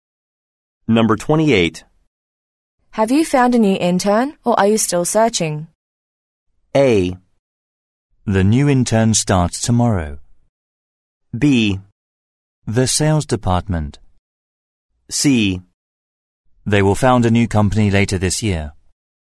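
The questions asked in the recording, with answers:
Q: Have you found a new intern, or are you still searching?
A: A: The new intern starts tomorrow.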